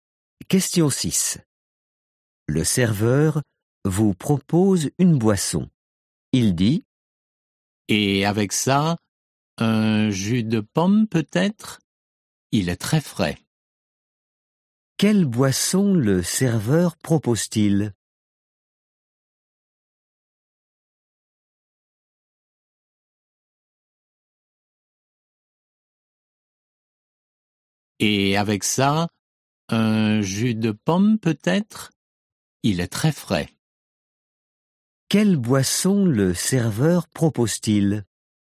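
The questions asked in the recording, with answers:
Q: Quelle boisson le serveur propose-t-il ?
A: Un jus de pomme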